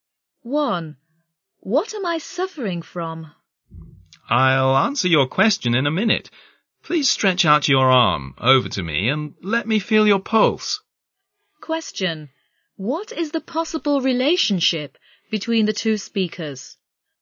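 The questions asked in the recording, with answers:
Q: What is the possible relationship between the two speakers?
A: Patient and doctor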